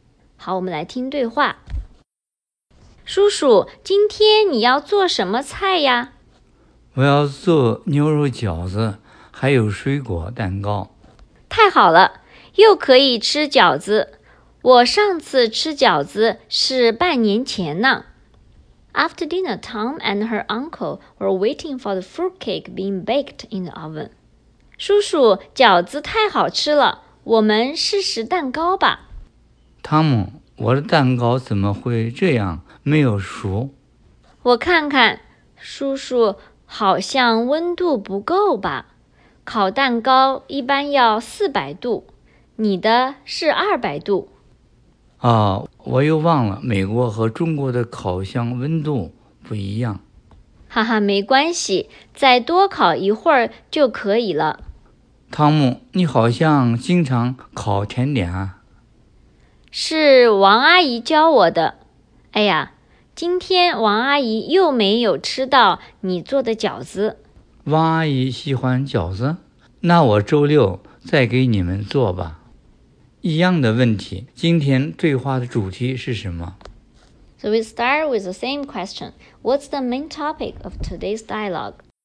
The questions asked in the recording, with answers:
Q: 一样的问题,今天对话的主题是什么?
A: 汤姆的叔叔以前说要给汤姆做菜,这次他真的做了饺子和水果蛋糕。